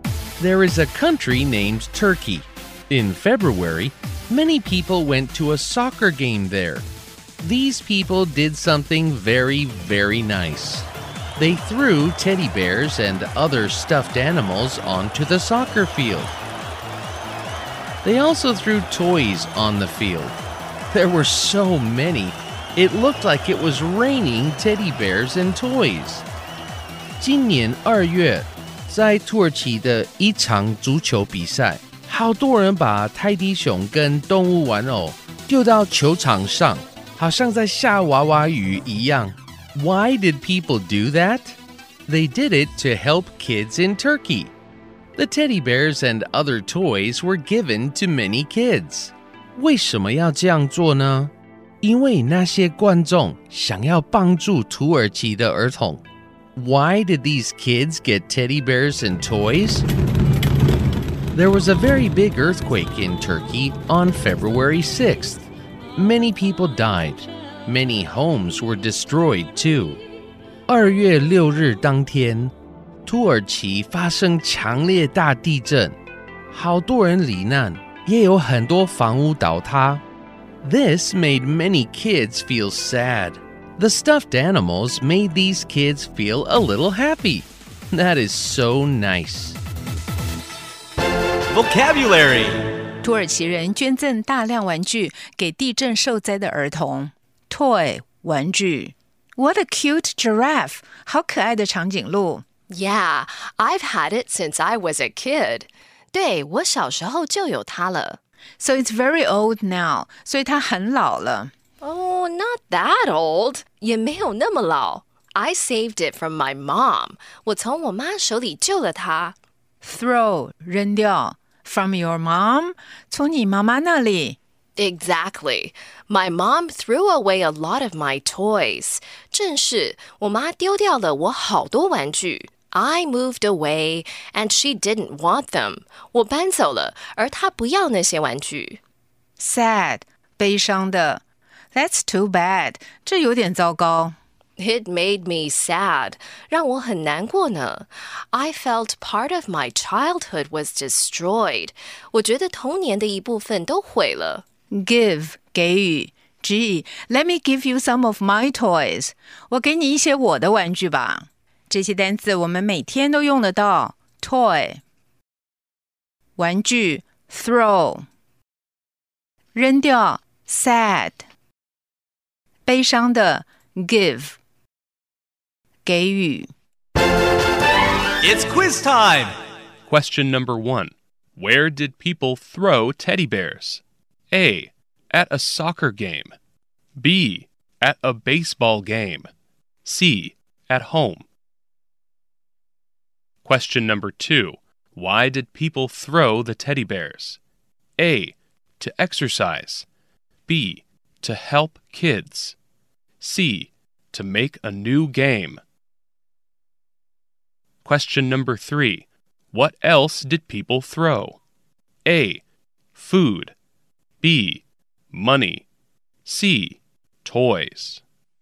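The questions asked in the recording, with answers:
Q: Where did people throw teddy bears?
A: A: At a soccer game.

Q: Why did people throw the teddy bears?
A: B: To help kids.

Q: What else did people throw?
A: C: Toys.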